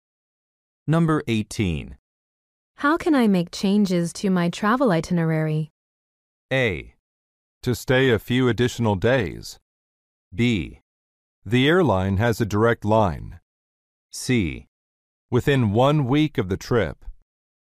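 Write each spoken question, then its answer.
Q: How can I make changes to my travel itinerary?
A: B: The airline has a direct line.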